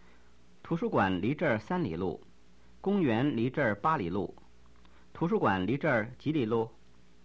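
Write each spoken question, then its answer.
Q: 图书馆离这儿几里路?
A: 三里路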